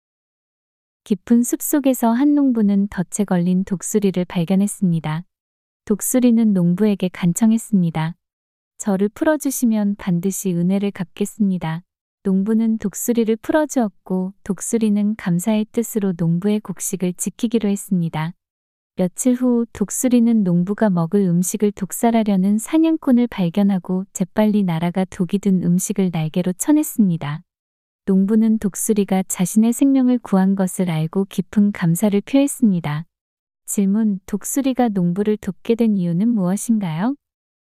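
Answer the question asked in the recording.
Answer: 농부가 덫에 걸린 독수리를 풀어주어 은혜를 갚으려고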